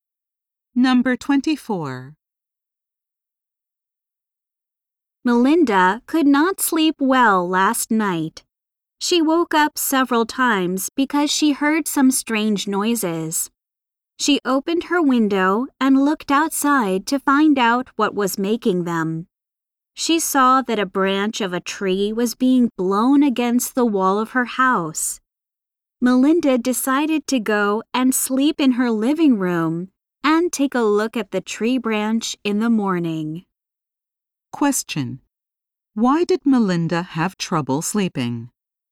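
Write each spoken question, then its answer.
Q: Why did Melinda have trouble sleeping?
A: A tree branch was blowing against her house making noises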